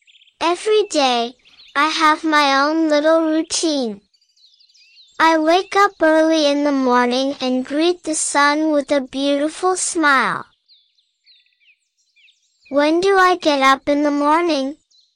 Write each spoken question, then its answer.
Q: When do I get up in the morning?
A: Early. I get up early in the morning.